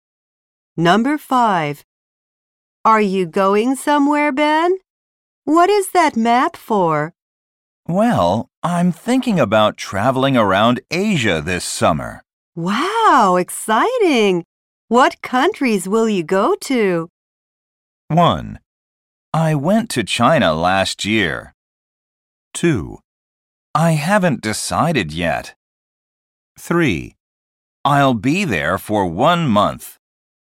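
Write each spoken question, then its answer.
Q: Wow, exciting! What countries will you go to?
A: 2: I haven't decided yet.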